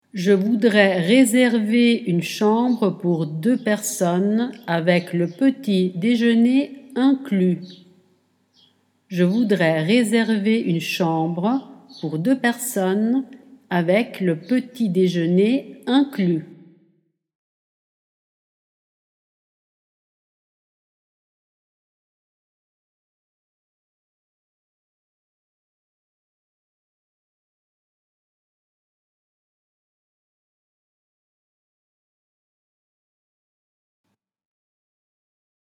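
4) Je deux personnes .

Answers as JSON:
{"4": "voudrais réserver une chambre pour / avec le petit déjeuner inclus"}

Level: Dettato di francese A2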